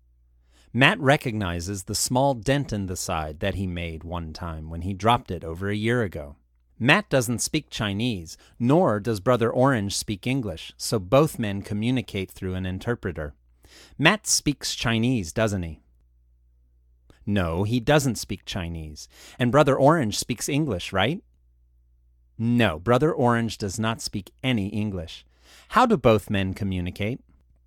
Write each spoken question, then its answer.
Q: How do both men communicate?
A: They communicate through an interpreter.